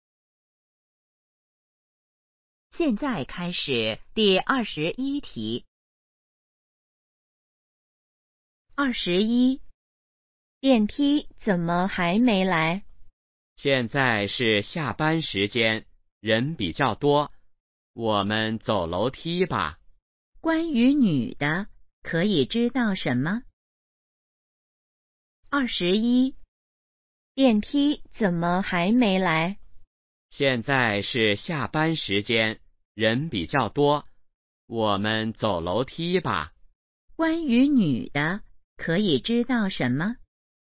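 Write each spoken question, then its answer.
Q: 关于女的,可以知道什么?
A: 她想走楼梯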